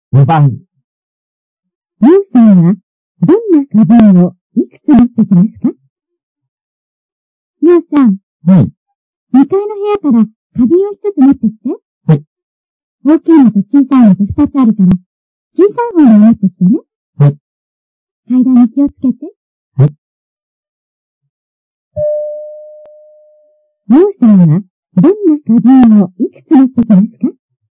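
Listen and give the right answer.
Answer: 小さい花瓶を1つ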